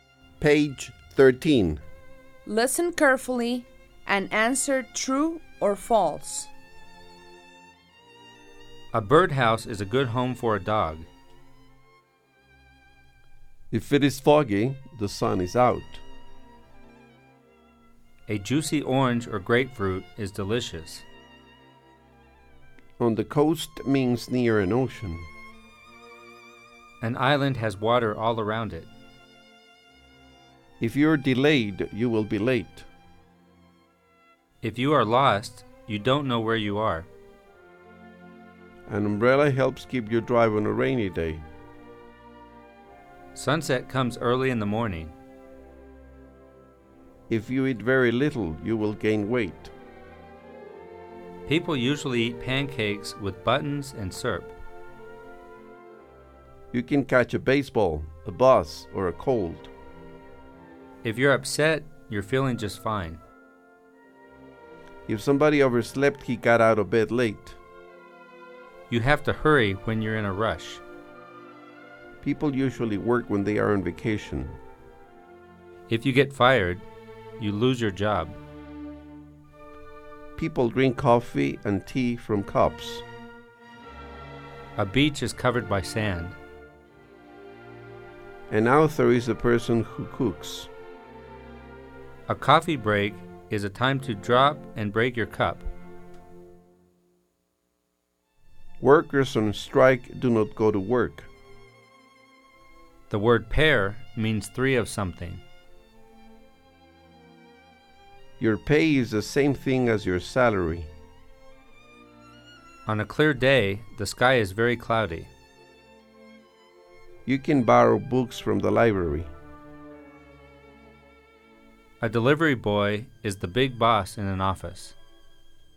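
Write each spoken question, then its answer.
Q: A birdhouse is a good home for a dog.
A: False

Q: If it is foggy, the sun is out.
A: False

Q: A juicy orange or grapefruit is delicious.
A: True

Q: On the coast means near an ocean.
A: True

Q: An island has water all around it.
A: True

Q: If you're delayed, you will be late.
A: True

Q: If you are lost, you don't know where you are.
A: True

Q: An umbrella helps keep you dry on a rainy day.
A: True

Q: Sunset comes early in the morning.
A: False

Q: If you eat very little, you will gain weight.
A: False

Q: People usually eat pancakes with buttons and syrup.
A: False

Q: You can catch a baseball, a bus, or a cold.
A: True

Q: If you're upset, you're feeling just fine.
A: False

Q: If somebody overslept, he got out of bed late.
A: True

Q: You have to hurry when you're in a rush.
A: True

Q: People usually work when they are on vacation.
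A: False

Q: If you get fired, you lose your job.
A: True

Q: People drink coffee and tea from cups.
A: True

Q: A beach is covered by sand.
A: True

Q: An author is a person who cooks.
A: False

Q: A coffee break is a time to drop and break your cup.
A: False

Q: Workers on strike do not go to work.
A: True

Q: The word pair means three of something.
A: False

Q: Your pay is the same thing as your salary.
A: True

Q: On a clear day, the sky is very cloudy.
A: False

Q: You can borrow books from the library.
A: True

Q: A delivery boy is the big boss in an office.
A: False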